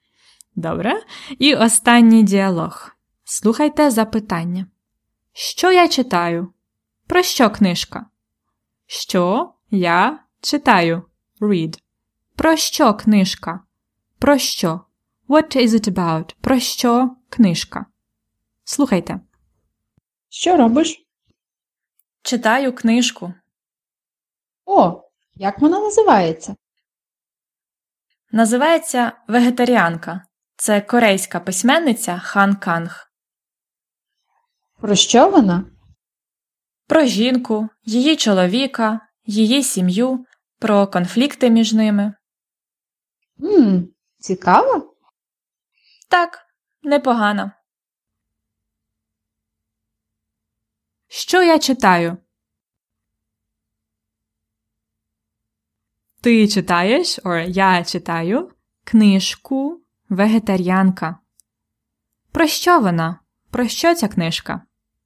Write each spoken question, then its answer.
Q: Про що книжка?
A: Вона про жінку, її чоловіка, її сім'ю і конфлікти між ними.